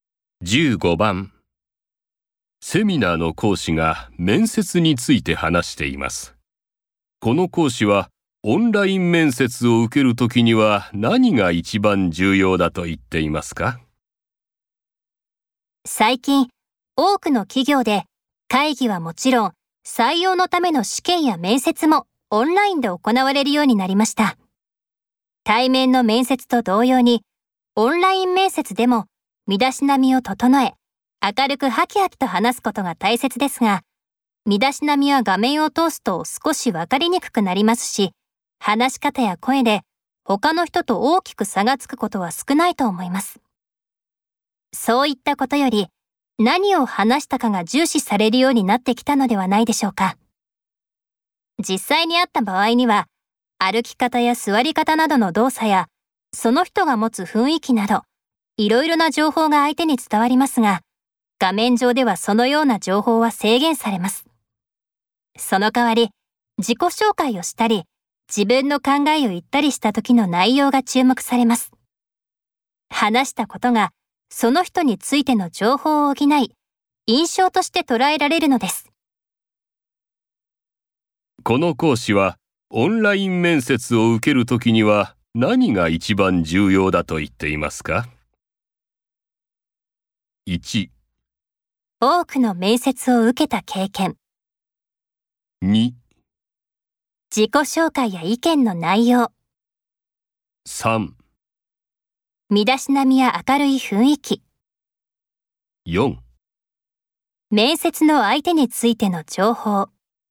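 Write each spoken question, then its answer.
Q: この講師はオンライン面接を受けるときには何が一番重要だと言っていますか?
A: 2: 自己紹介や意見の内容。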